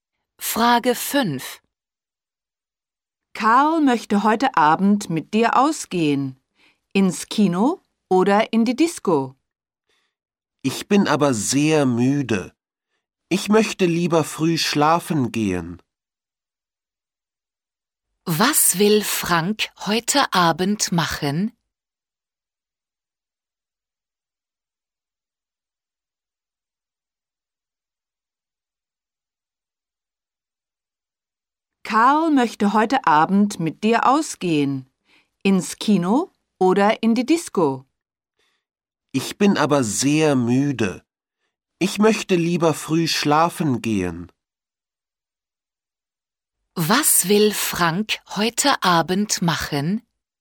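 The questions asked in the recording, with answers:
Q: Was will Frank heute Abend machen?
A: Früh schlafen gehen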